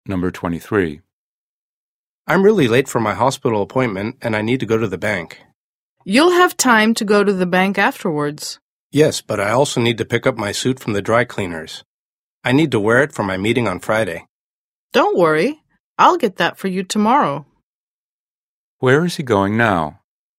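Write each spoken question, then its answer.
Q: Where is he going now?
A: to the hospital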